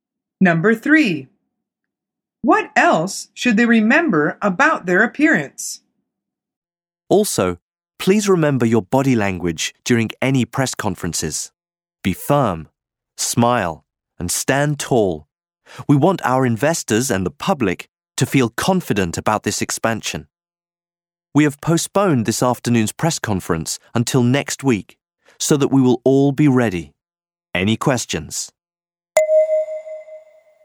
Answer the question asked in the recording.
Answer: The answer is their body language.